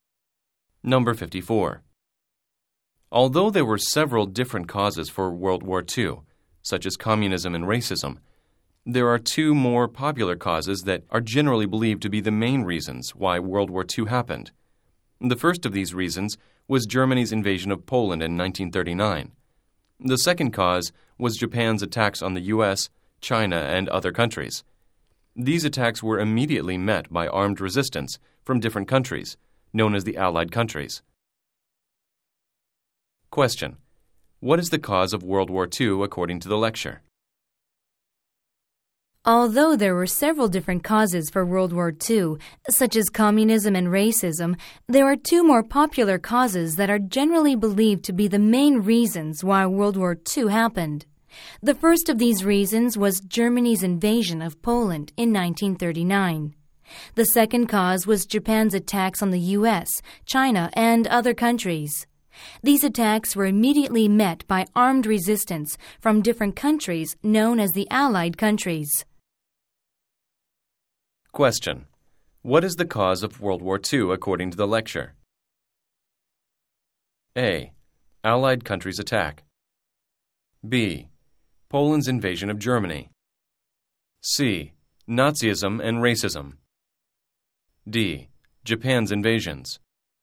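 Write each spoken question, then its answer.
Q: What is the cause of World War II according to the lecture?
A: D: Japan's invasions.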